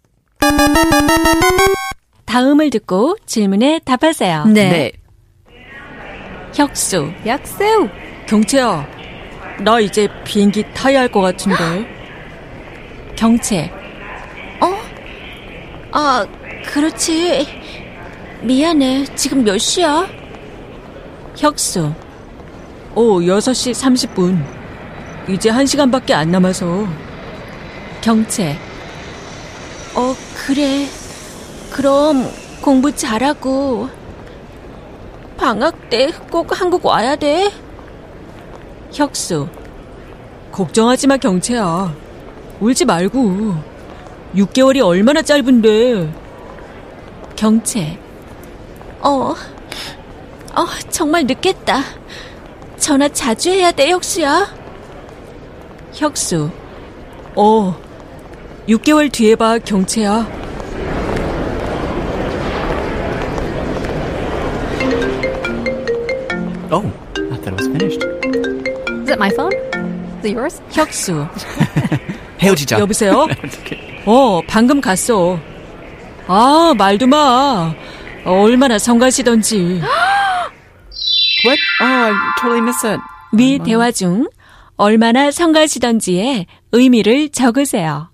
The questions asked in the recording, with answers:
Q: 위 대화 중 얼마나 성가시던지의 의미를 적으세요.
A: the answer is something more along the lines of 귀찮다.